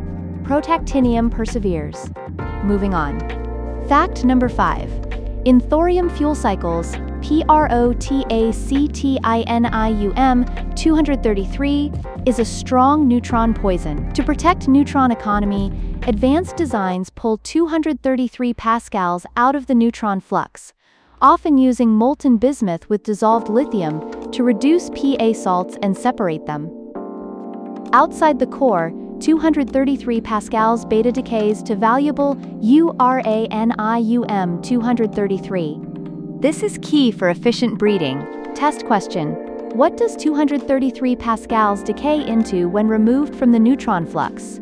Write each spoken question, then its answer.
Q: What does 233 pascals decay into when removed from the neutron flux?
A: uranium-233.